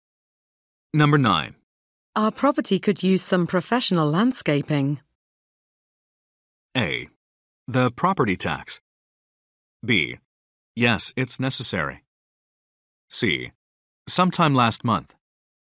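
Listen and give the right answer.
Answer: B: Yes, it's necessary.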